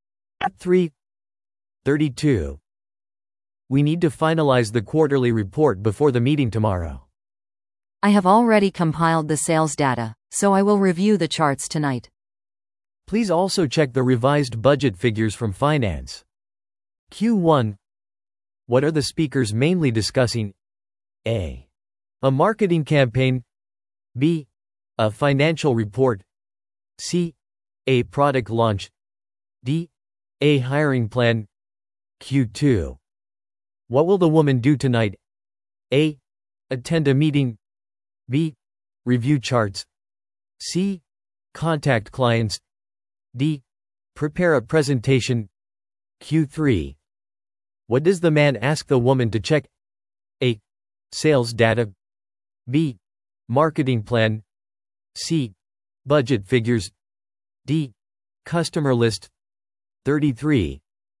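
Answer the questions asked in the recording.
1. B: A financial report.
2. B: Review charts.
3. C: Budget figures.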